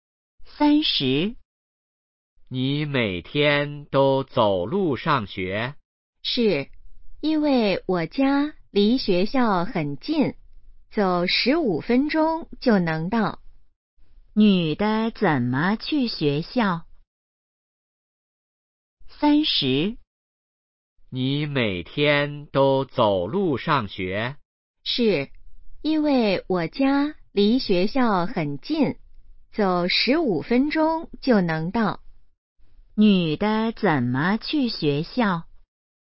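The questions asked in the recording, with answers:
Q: 女的怎么去学校?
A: 走路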